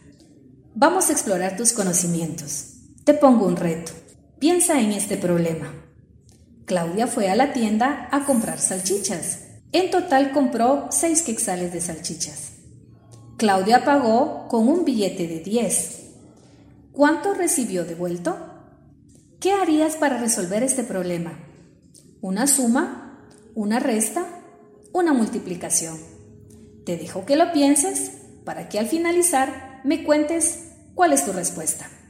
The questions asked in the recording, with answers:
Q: ¿Cuánto recibió devuelto?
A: Si tu respuesta es 4, estás en lo correcto.